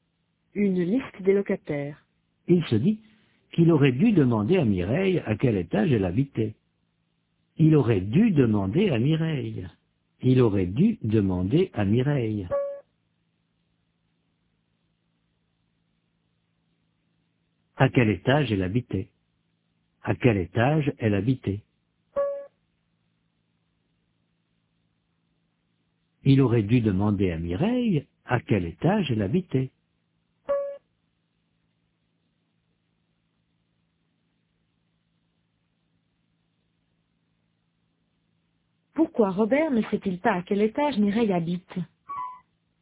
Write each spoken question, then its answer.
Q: Pourquoi Robert ne sait-il pas à quel étage Mireille habite?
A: Parce qu'il n'a pas demandé à Mireille à quel étage elle habitait.